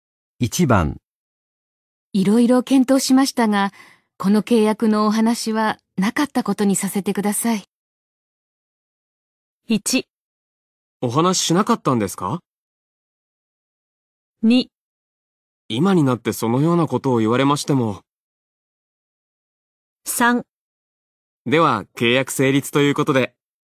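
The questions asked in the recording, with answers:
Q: いろいろ検討しましたが、この契約のお話はなかったことにさせてください。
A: 2: 今になってそのようなことを言われましても。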